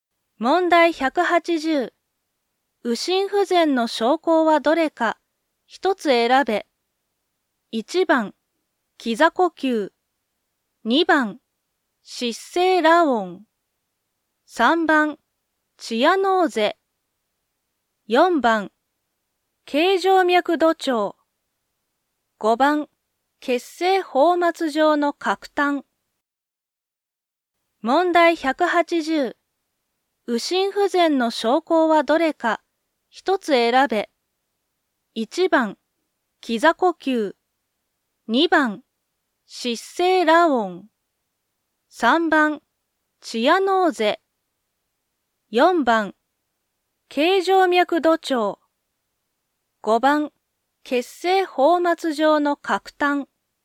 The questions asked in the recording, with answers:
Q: 右心不全の症候はどれか、一つ選べ。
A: 4番、頸静脈度調。